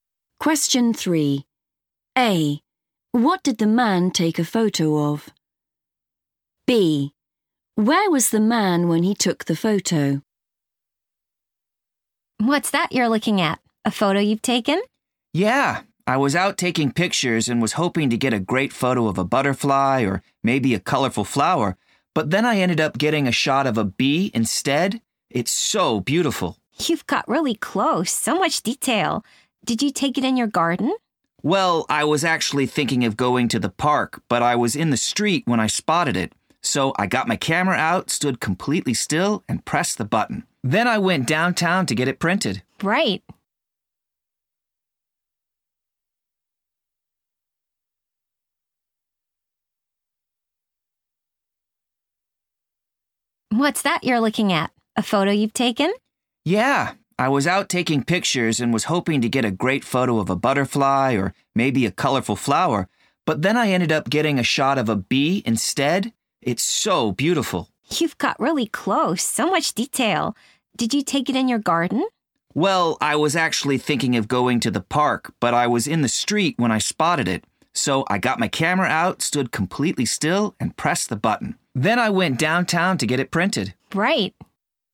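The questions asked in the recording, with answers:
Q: What did the man take a photo of?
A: a bee

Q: Where was the man when he took the photo?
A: in the street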